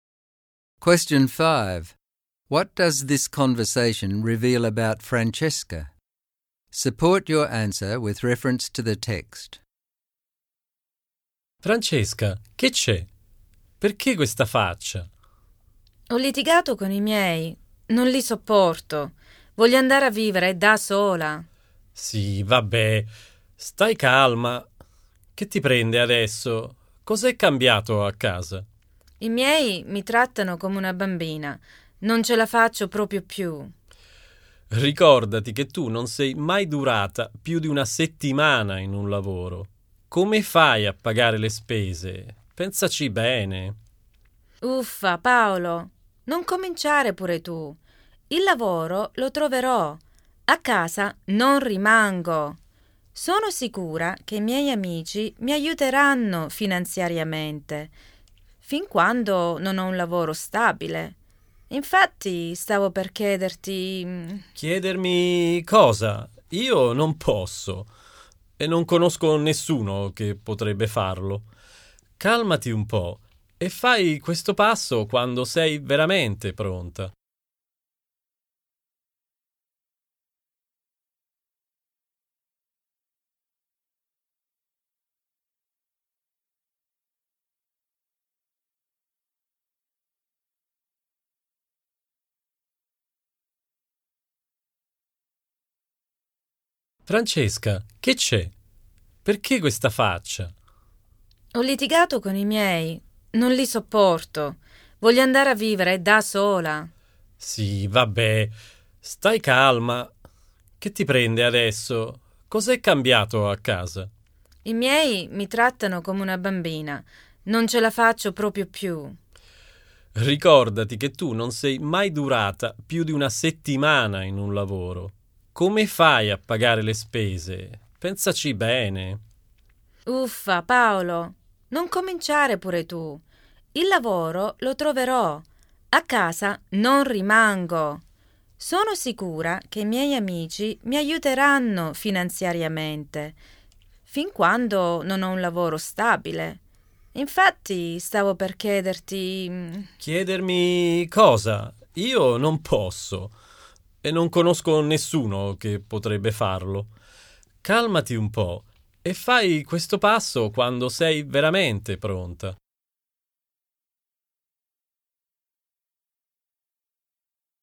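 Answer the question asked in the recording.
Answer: She is impulsive and immature. She wants to move out after a fight with her parents, but she has never kept a job longer than a week and expects friends to pay her way.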